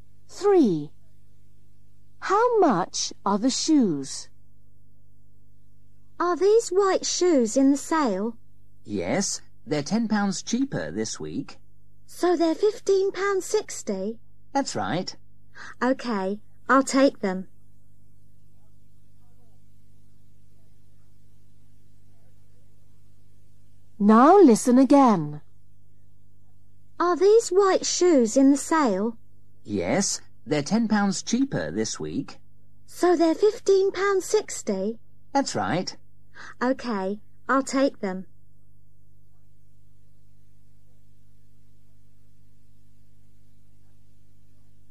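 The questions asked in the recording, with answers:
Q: How much are the shoes?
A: £15.60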